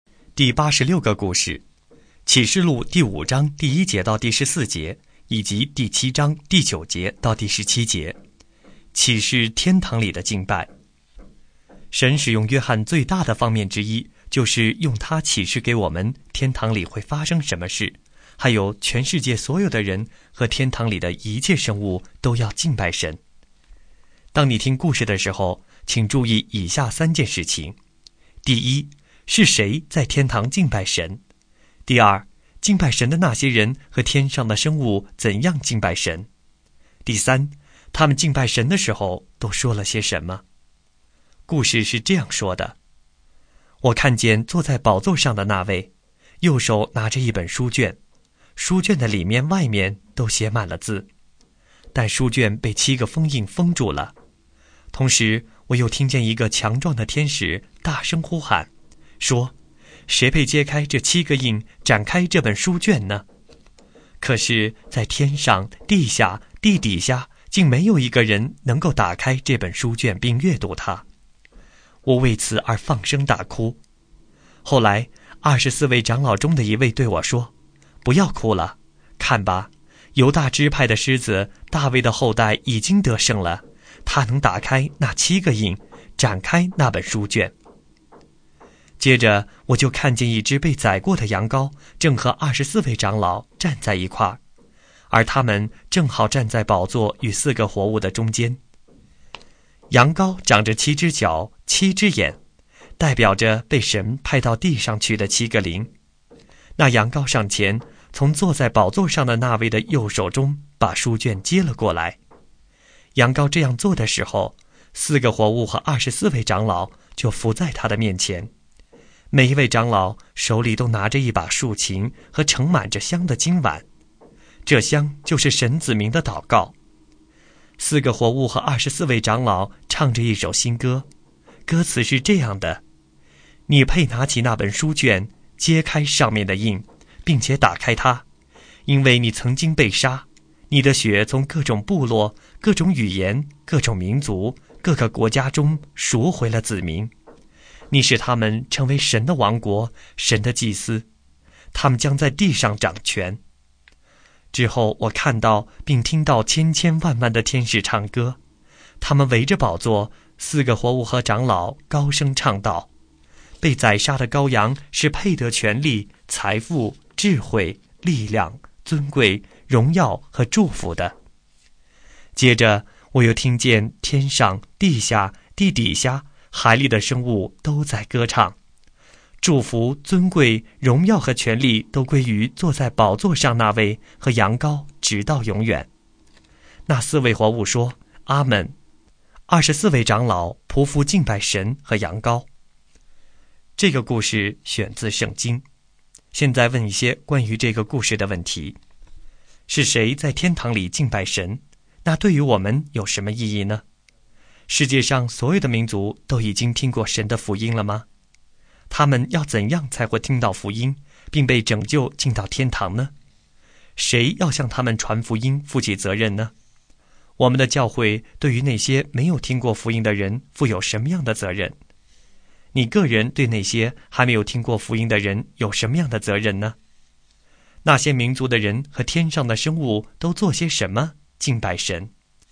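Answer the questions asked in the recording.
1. 四个活物、二十四位长老、千千万万的天使,以及天上、地下、地底下、海里的一切生物
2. 他们俯伏在羊羔面前,拿着竖琴和盛满香(祷告)的金碗,唱新歌,高声赞美,说阿们,并匍匐敬拜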